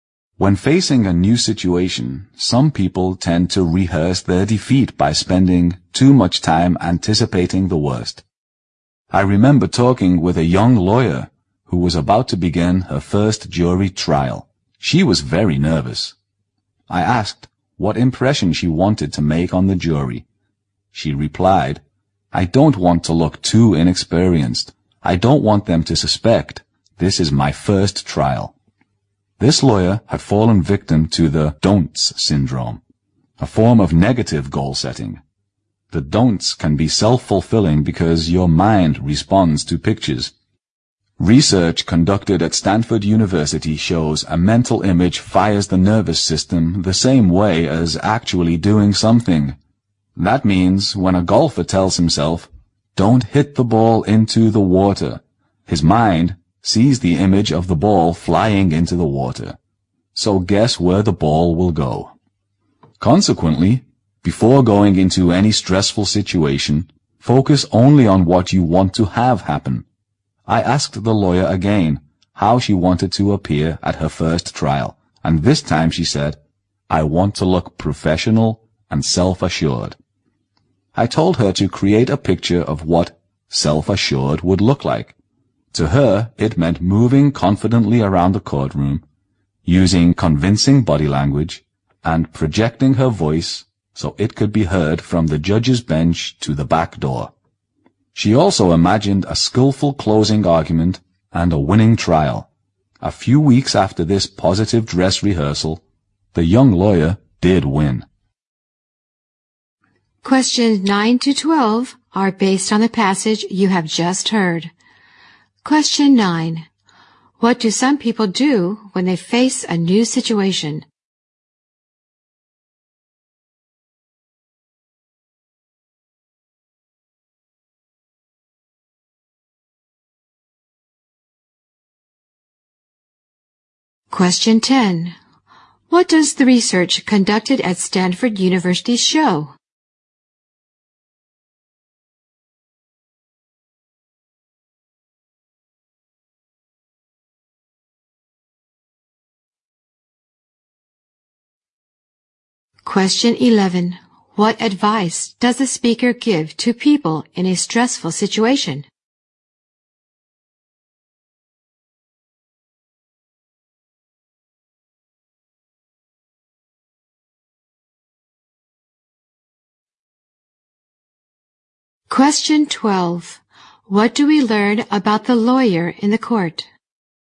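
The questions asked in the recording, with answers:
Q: What do some people do when they face a new situation?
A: They spend too much time anticipating the worst.

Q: What does the research conducted at Stanford University show?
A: A mental image fires the nervous system the same way as actually doing something.

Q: What advice does a speaker give to people in a stressful situation?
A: Focus only on what you want to have happen.

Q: What do we learn about the lawyer in the court?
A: She won her first trial.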